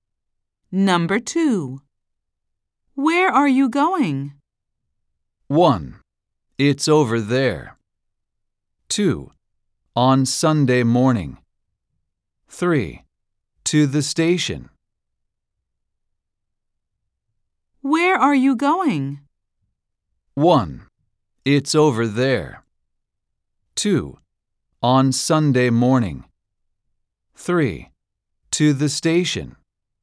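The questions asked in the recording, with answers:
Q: Where are you going?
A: 3: To the station.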